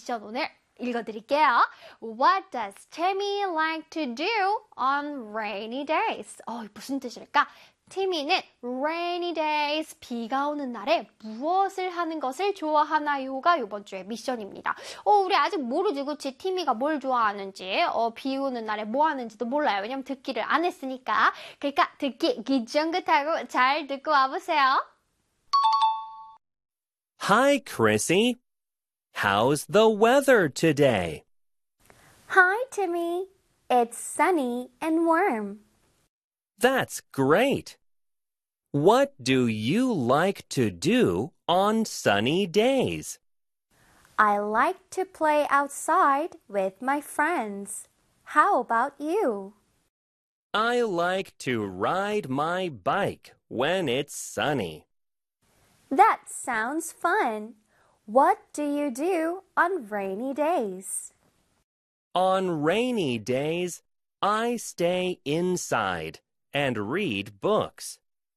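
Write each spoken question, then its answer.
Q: What does Timmy like to do on rainy days?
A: He stays inside and reads books.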